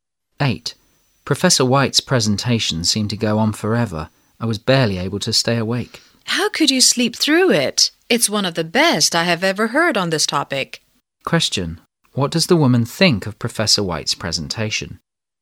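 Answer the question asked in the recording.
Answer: It was excellent, one of the best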